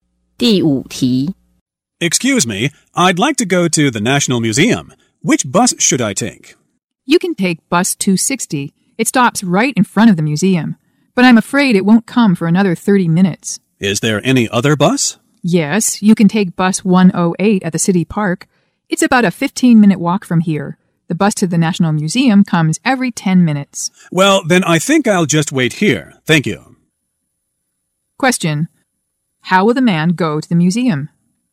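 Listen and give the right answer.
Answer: He will wait for bus 260 there.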